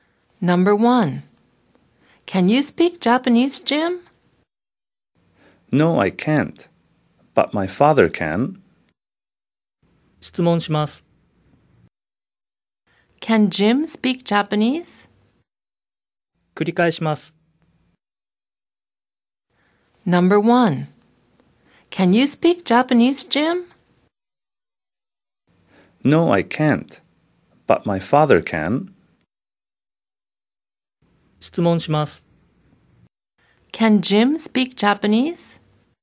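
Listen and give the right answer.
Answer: No, he can't.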